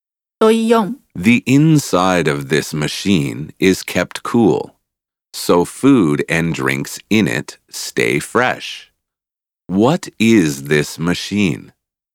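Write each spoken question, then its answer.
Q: What is this machine?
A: A refrigerator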